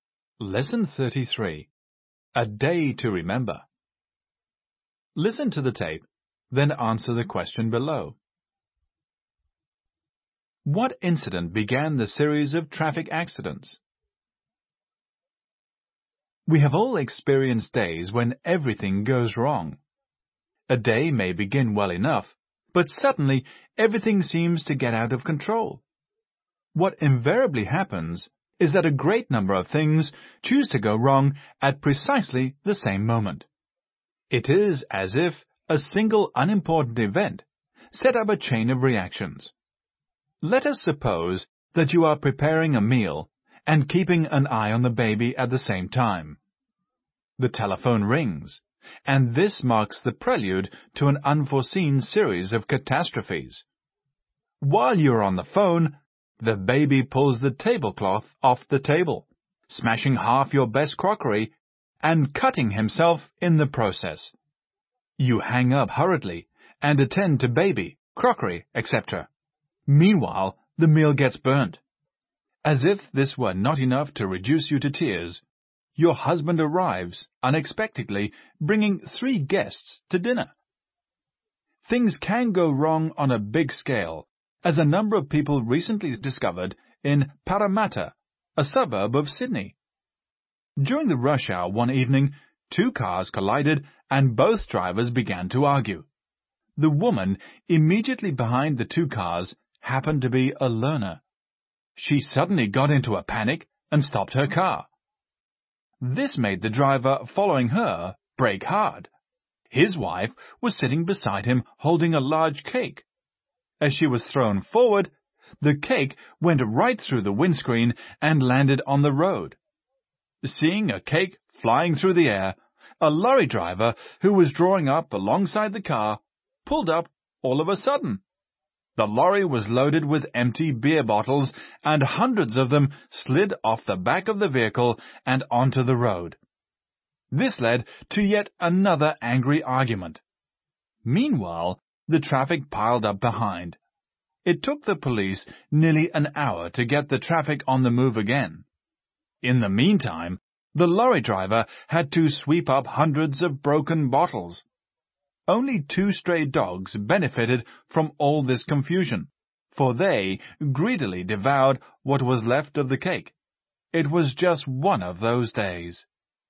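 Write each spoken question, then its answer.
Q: What incident began the series of traffic accidents?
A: Two cars collided during the rush hour and both drivers began to argue.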